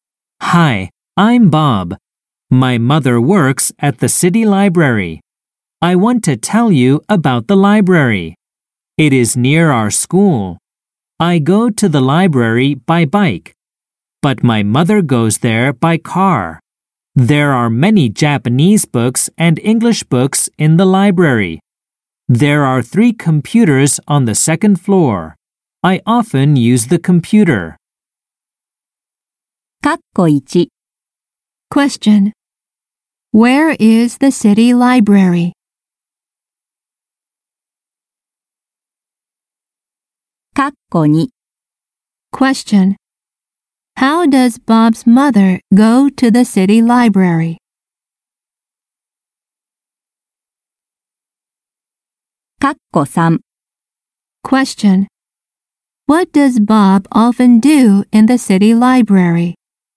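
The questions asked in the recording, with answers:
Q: Where is the city library?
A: It is near Bob's school.

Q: How does Bob's mother go to the city library?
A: By car.

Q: What does Bob often do in the city library?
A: He uses the computer.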